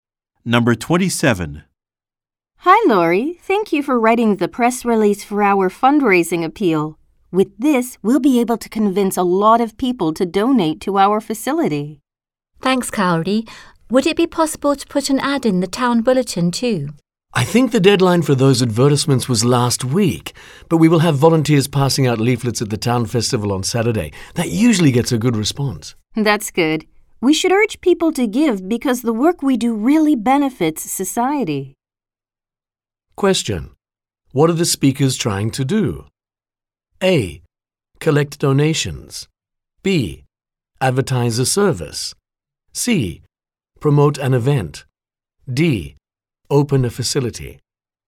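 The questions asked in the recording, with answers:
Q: What are the speakers trying to do?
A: A: Collect donations.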